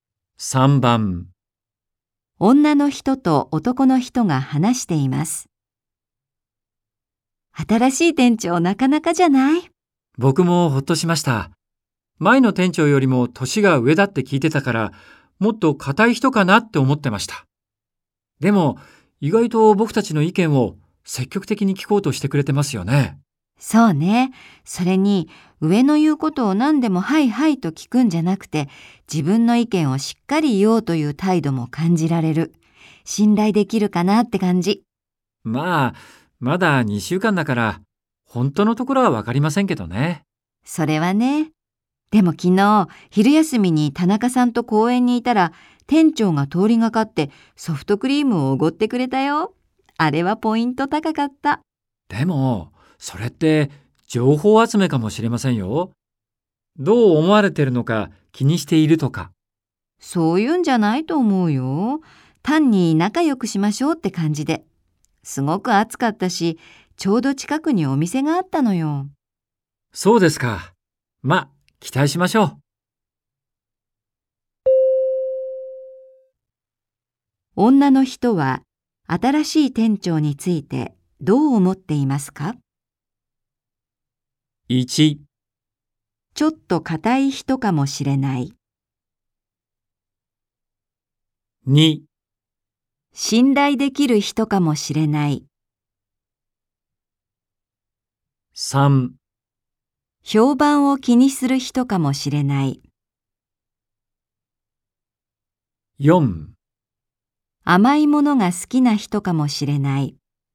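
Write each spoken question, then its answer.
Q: 女の人は新しい店長についてどう思っていますか?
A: 2: 信頼できる人かもしれない。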